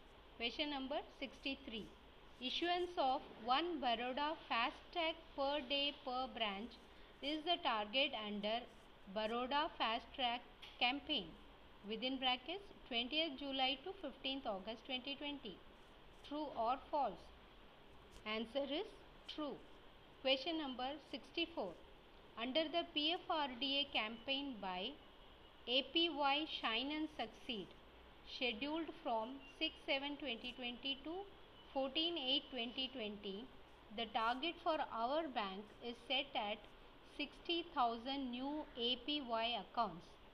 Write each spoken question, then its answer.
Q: Issuance of 1 Baroda fast tag per day per branch is the target under Baroda Fast Track Campaign within brackets 20th July to 15th August 2020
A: answer is true